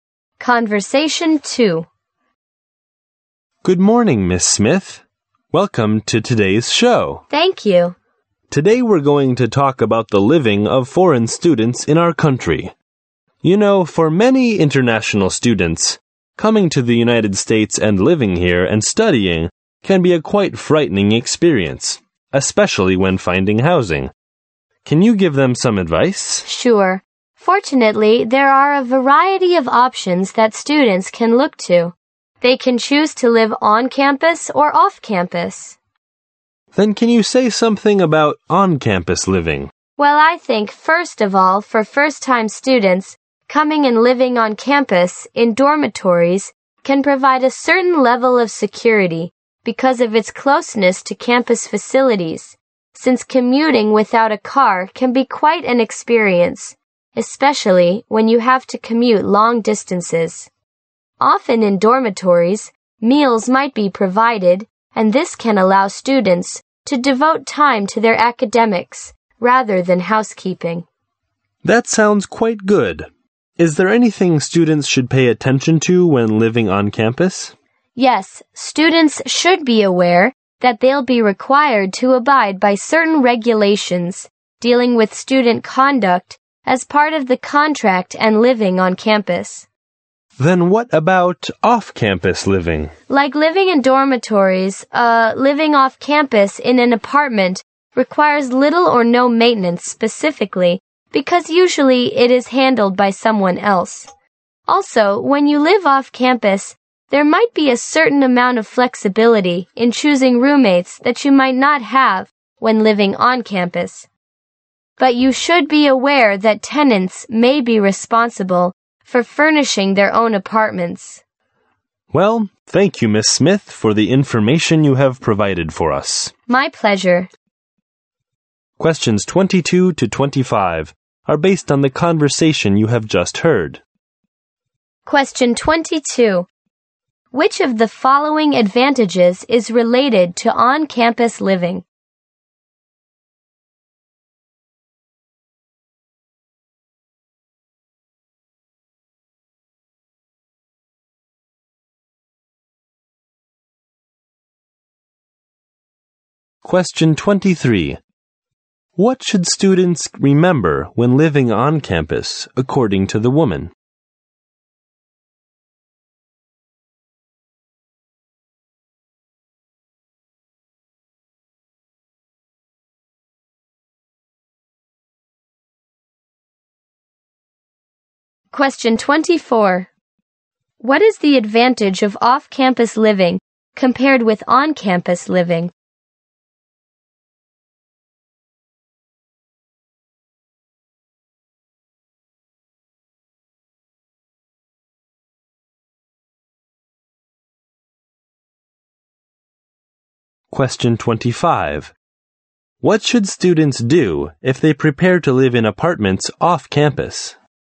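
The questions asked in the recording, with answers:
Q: What should students remember when living on campus, according to the woman?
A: They must follow the rules on student conduct.

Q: What is the advantage of off-campus living compared with on-campus living?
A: More flexibility in choosing roommates.

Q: What should students do if they prepare to live in apartments off campus?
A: Furnish their own apartments.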